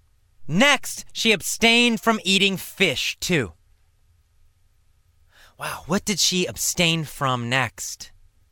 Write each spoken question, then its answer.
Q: Wow, what did she abstain from next?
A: She abstained from fish. She abstained from eating fish next.